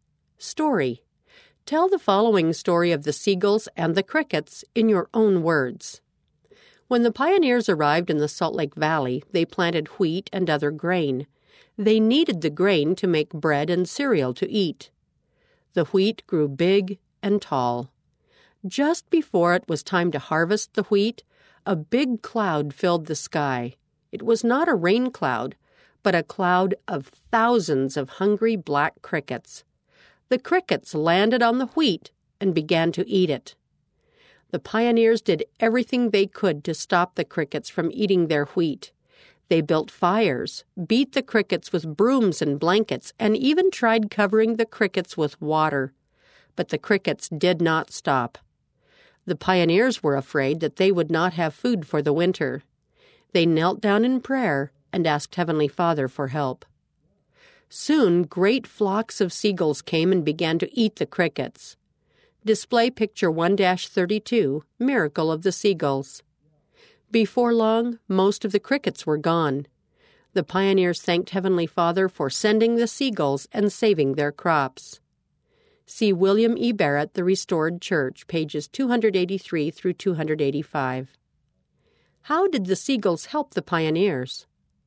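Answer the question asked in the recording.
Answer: They ate the crickets that were eating the pioneers' wheat.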